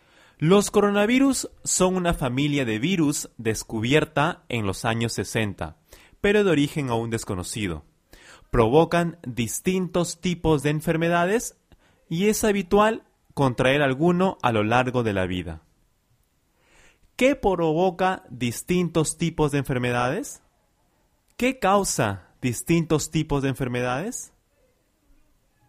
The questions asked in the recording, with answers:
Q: ¿Qué provoca distintos tipos de enfermedades?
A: Los coronavirus. Los coronavirus provocan distintos tipos de enfermedades.